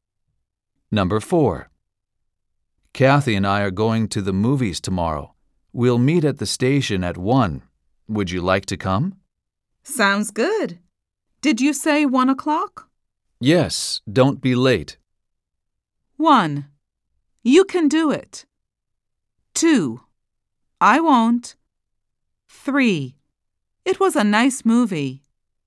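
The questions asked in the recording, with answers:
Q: Yes, don't be late.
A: 2: I won't.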